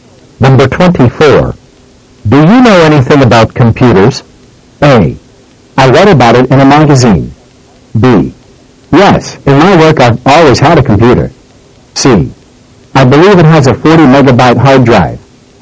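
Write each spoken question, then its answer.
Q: Do you know anything about computers?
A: B: Yes, in my work I've always had a computer.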